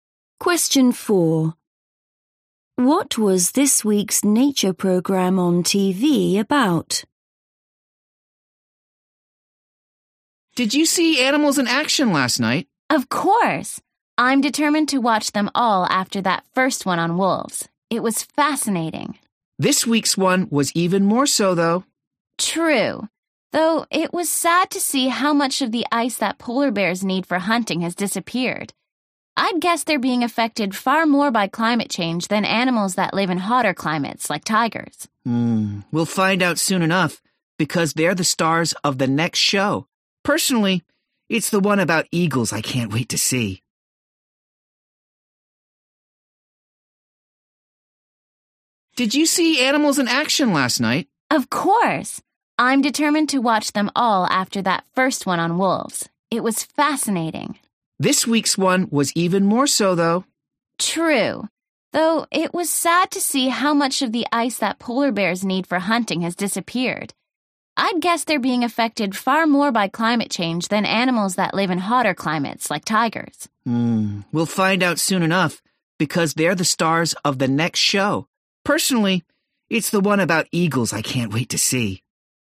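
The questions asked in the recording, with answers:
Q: What was this week's nature programme on TV about?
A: polar bears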